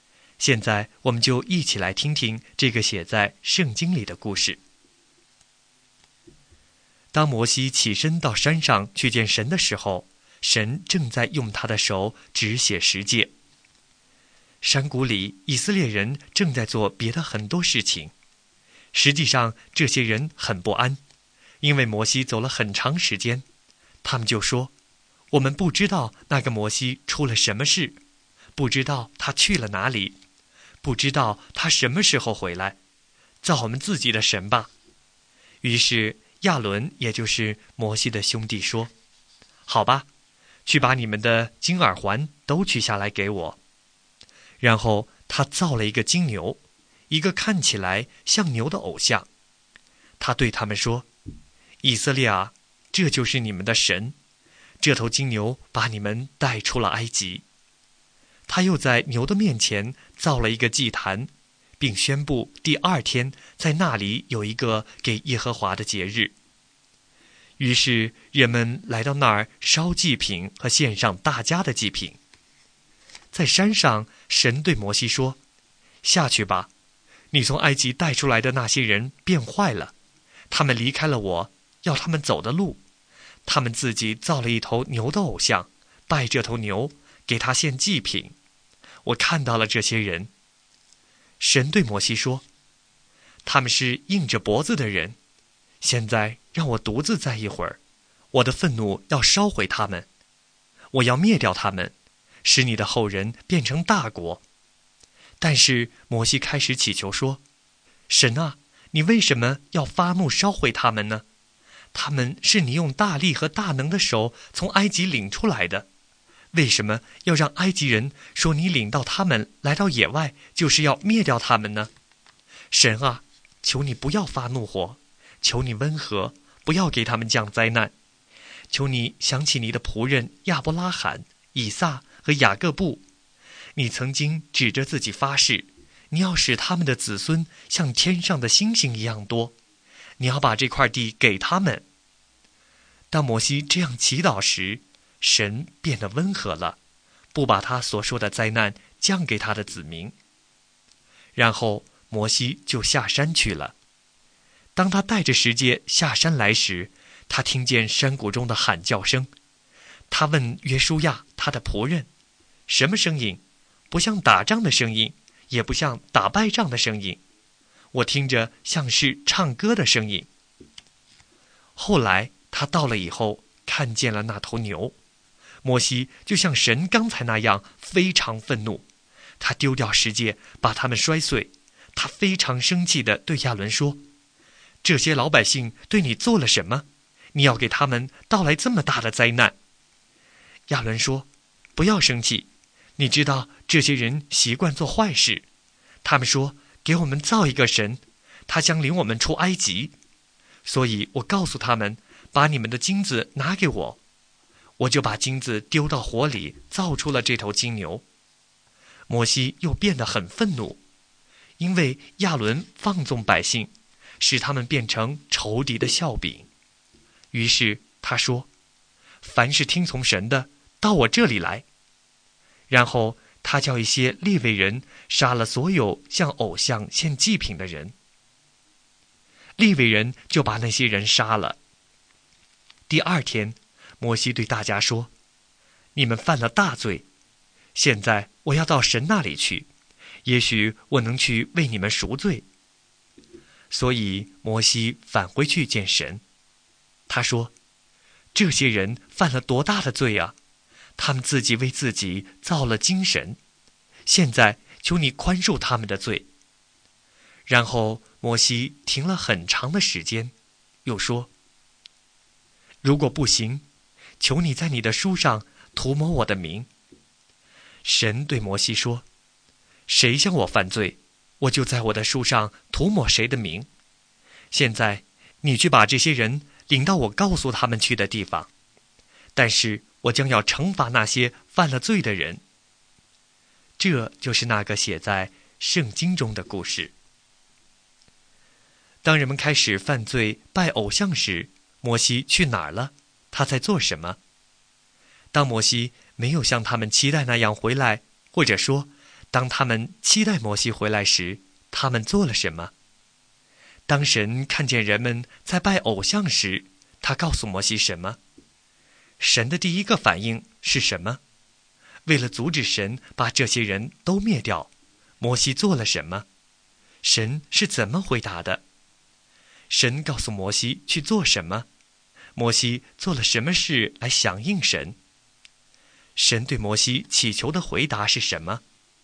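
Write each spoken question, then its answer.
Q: 他在做什么?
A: 从神那里接受十诫

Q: 当摩西没有像他们期待那样回来,或者说当他们期待摩西回来时,他们做了什么?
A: 让亚伦用金耳环造了一头金牛偶像,拜它献祭

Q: 当神看见人们在拜偶像时,他告诉摩西什么?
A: 下山去,百姓变坏了,造了牛的偶像来拜

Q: 神的第一个反应是什么?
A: 发怒,要灭掉他们

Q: 为了阻止神把这些人都灭掉,摩西做了什么?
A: 向神祈求,求神想起对亚伯拉罕、以撒和雅各的誓言

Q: 神是怎么回答的?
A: 神变得温和,不降灾难给他的子民

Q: 神告诉摩西去做什么?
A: 把百姓领到神告诉他们去的地方

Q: 神对摩西祈求的回答是什么?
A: 谁向神犯罪就涂抹谁的名,神要惩罚犯罪的人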